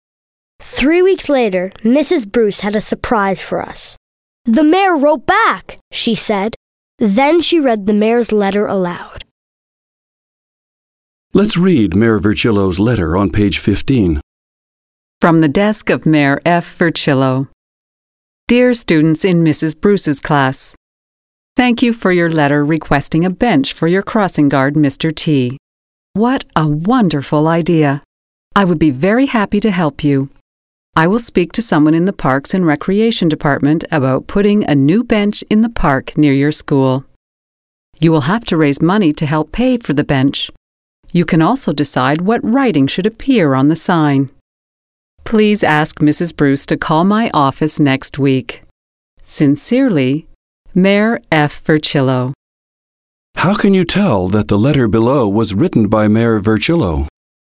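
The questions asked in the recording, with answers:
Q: How can you tell that the letter below was written by Mayor Virchillo?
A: It says "From the desk of Mayor F. Virchillo" and is signed "Sincerely, Mayor F. Virchillo."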